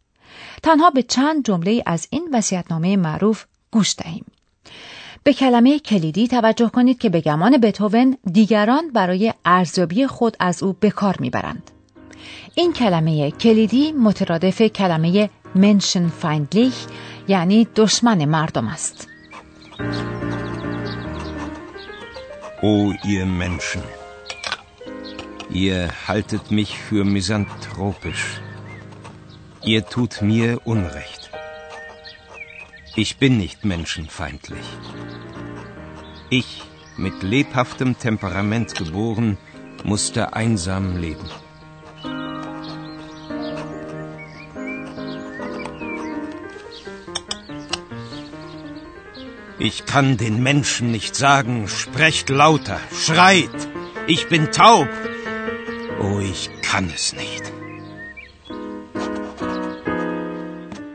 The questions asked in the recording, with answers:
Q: به کلمه کلیدی توجه کنید که به گمان بتوون دیگران برای ارزیابی خود از او به کار میبرند.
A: آیا متوجه کلمه کلیدی میزانتروپیش شدید؟